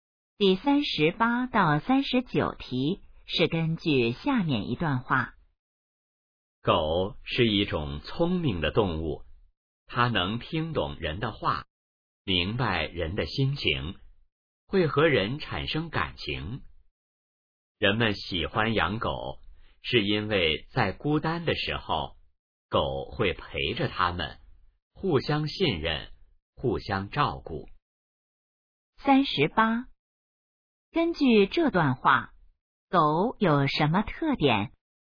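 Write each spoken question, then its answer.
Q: 根据这段话,狗有什么特点?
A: 聪明,能听懂人的话

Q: 人们为什么喜欢狗?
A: 孤单时狗会陪着他们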